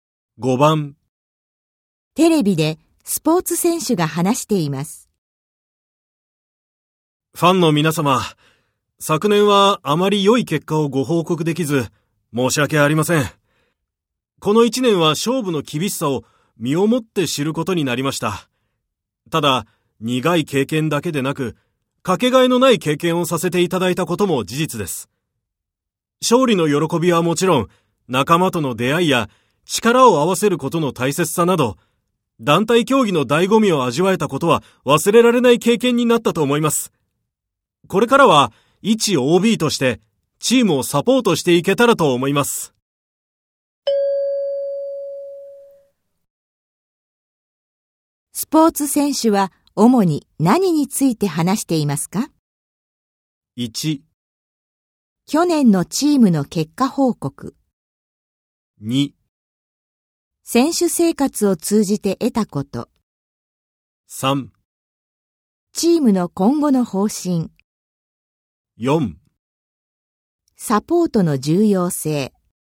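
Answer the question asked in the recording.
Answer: 2: 選手生活を通じて得たこと。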